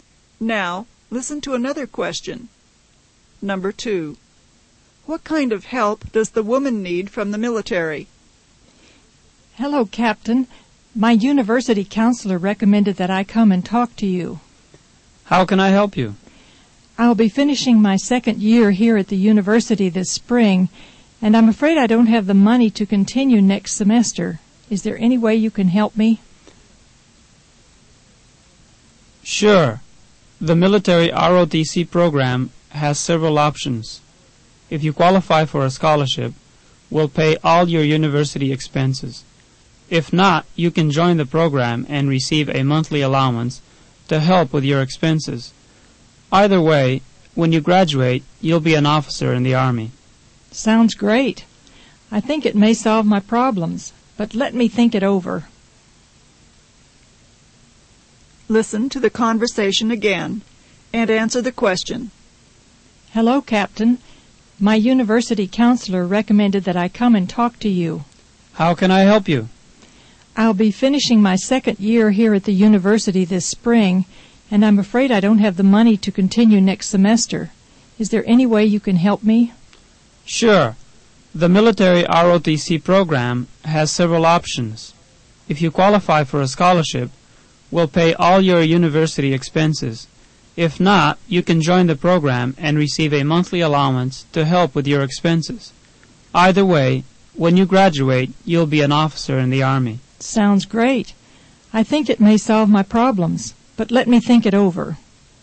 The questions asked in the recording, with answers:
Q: What kind of help does the woman need from the military?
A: she needs help with university expenses.